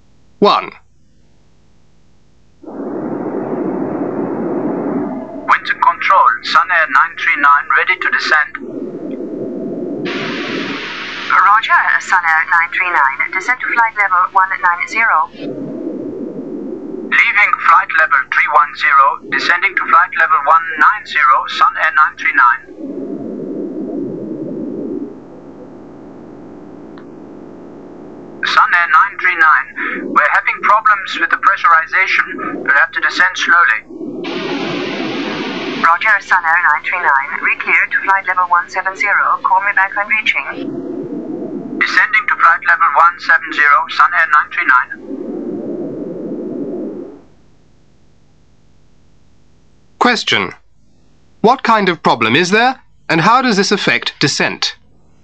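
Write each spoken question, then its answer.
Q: What kind of problem is there, and how does this affect descent?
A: Problems with the pressurization, so they must descend slowly.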